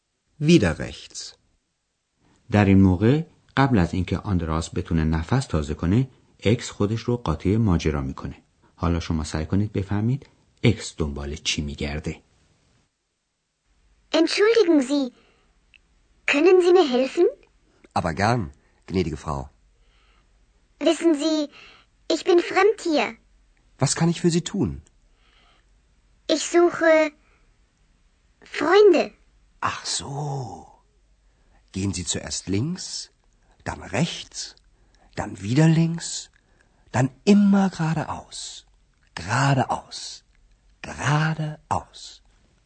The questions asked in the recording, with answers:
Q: حالا شما سعی کنید بفهمید اکس دنبال چی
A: پس اکس گفت که در جستجوی دوستان است یعنی میخواد دوست پیدا کنه